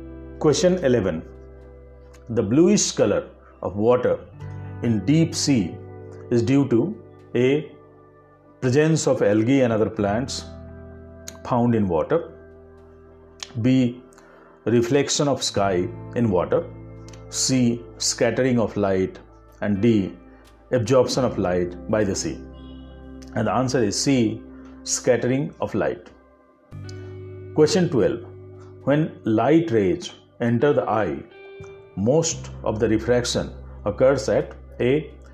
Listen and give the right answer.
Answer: the answer is c scattering of light